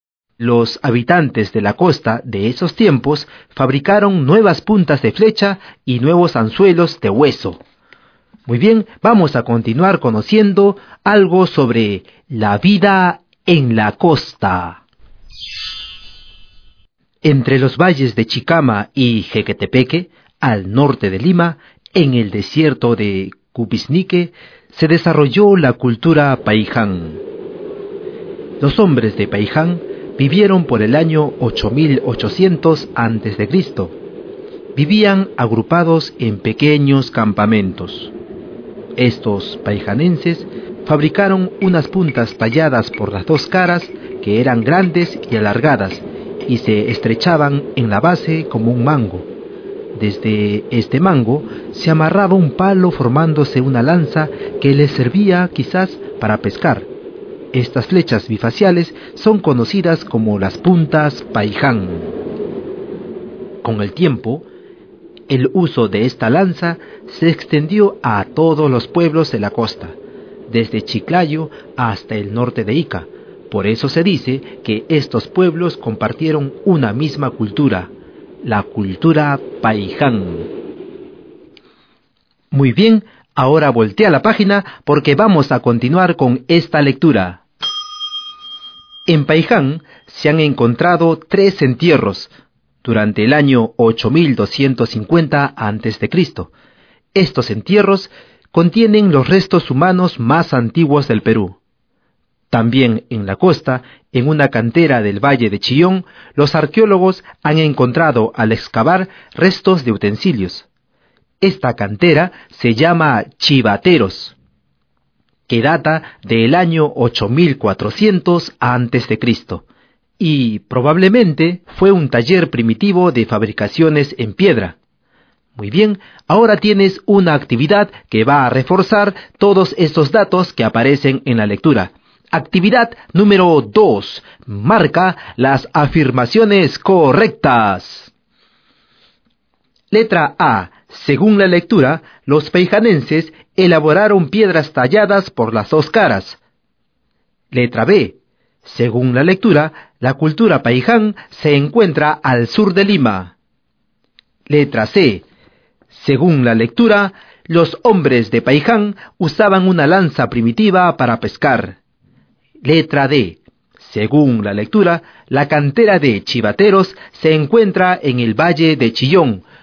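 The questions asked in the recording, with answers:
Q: Letra A. Según la lectura, los paijanenses elaboraron piedras talladas por las dos caras.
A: Correcta

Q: Letra B. Según la lectura, la cultura Paiján se encuentra al sur de Lima.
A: Incorrecta (está al norte de Lima)

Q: Letra D. Según la lectura, la cantera de Chivateros se encuentra en el Valle de Chillón.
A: Correcta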